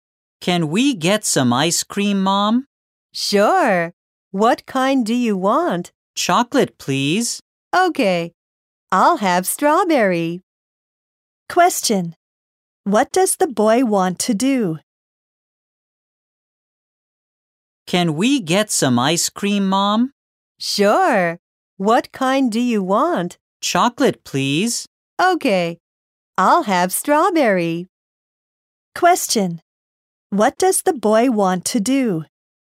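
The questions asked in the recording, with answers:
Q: What does the boy want to do?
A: Get some ice cream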